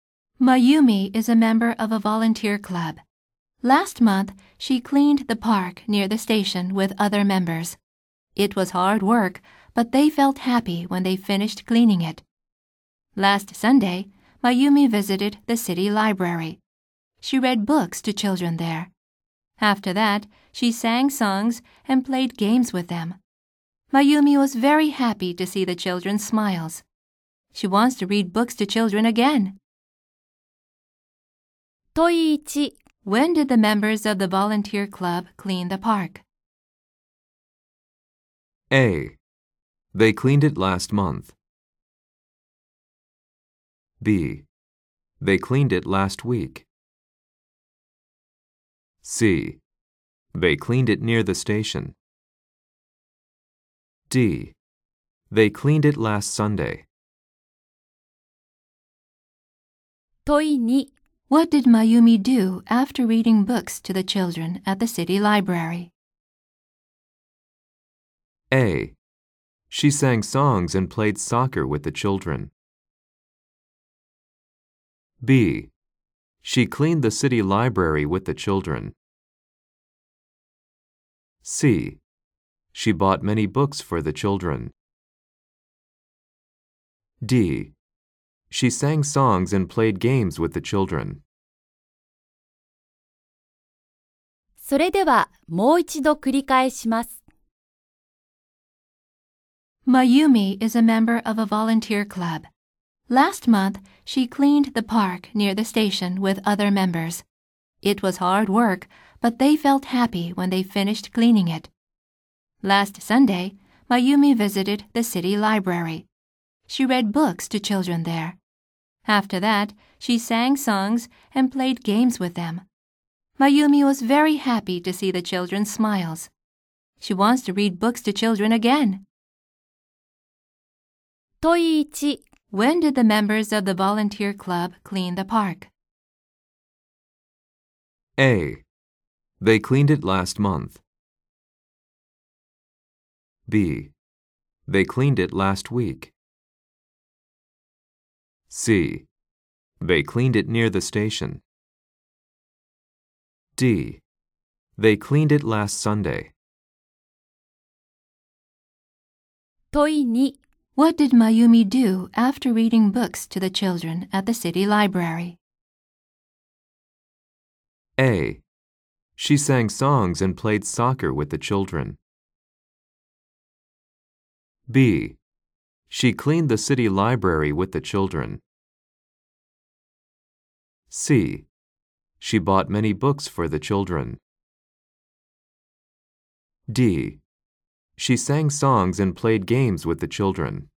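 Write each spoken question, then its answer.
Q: When did the members of the volunteer club clean the park?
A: A: They cleaned it last month.

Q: What did Mayumi do after reading books to the children at the city library?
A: D: She sang songs and played games with the children.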